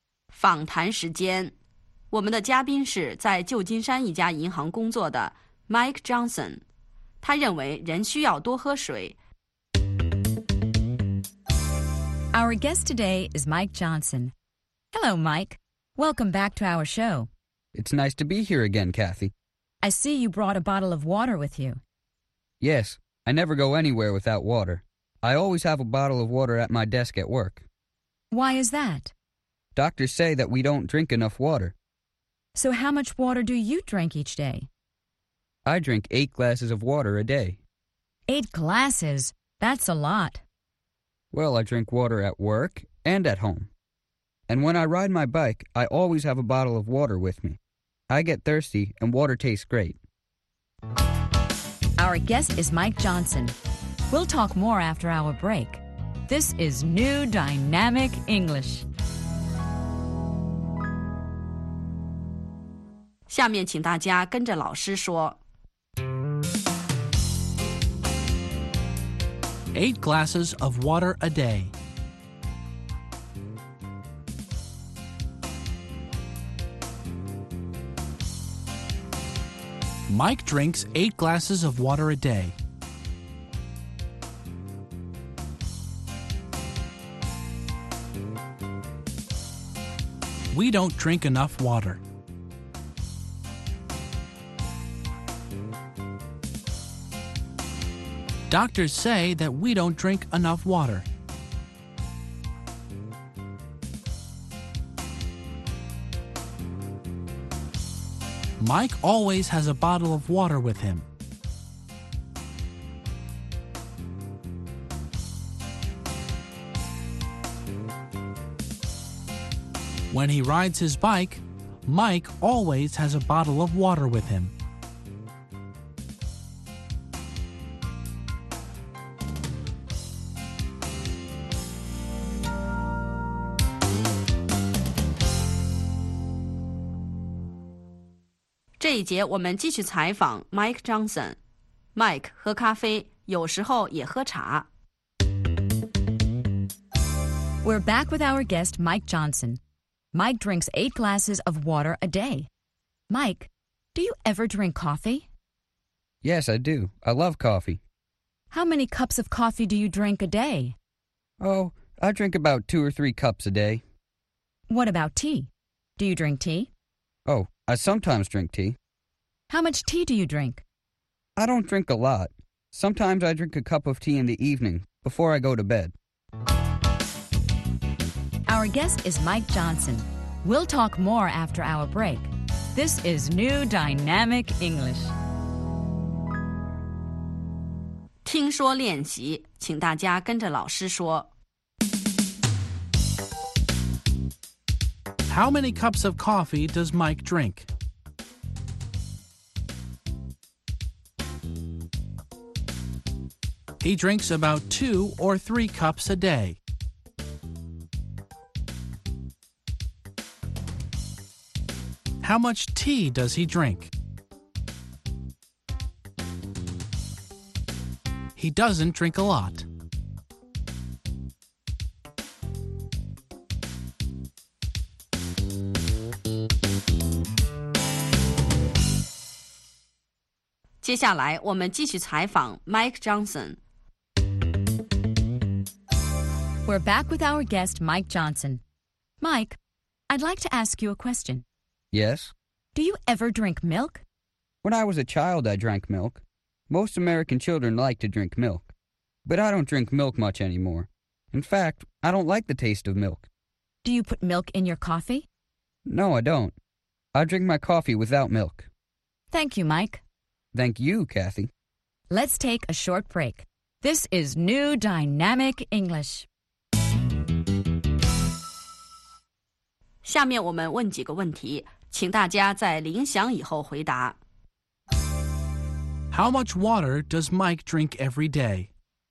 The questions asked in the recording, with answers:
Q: How much water does Mike drink every day?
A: He drinks 8 glasses of water a day.